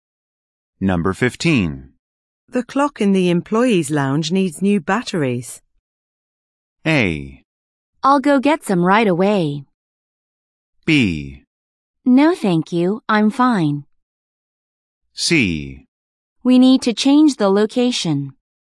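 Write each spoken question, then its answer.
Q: The clock in the employees' lounge needs new batteries.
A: A: I'll go get some right away.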